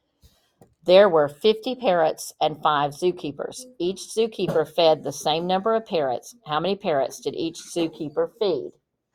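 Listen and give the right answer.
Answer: 10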